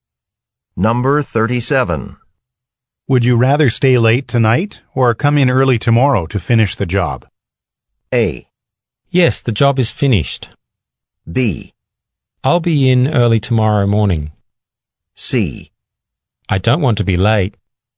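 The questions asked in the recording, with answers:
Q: Would you rather stay late tonight or come in early tomorrow to finish the job?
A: B: I'll be in early tomorrow morning.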